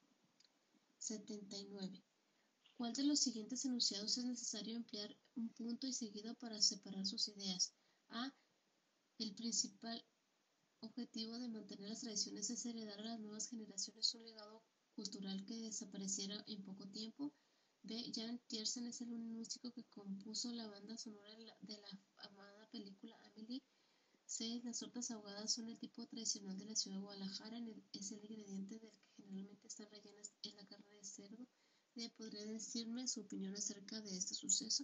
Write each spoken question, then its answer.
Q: ¿Cuál de los siguientes enunciados es necesario emplear un punto y seguido para separar sus ideas?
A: La respuesta correcta es la C.